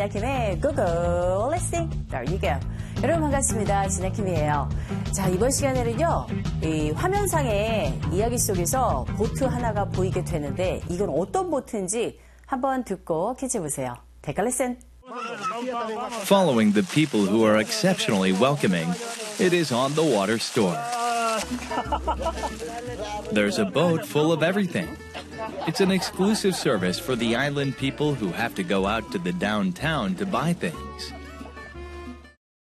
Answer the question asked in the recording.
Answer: 바로 이 배는요, 상점, 그 배 위에 매점처럼 되어 있는 그런 배입니다.